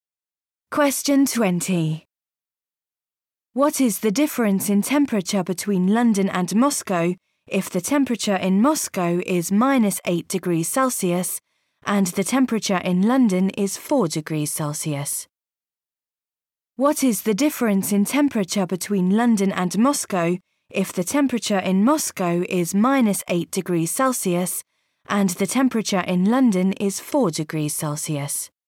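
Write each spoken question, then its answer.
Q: What is the difference in temperature between London and Moscow if the temperature in Moscow is minus 8 degrees Celsius and the temperature in London is 4 degrees Celsius?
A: 12 degrees Celsius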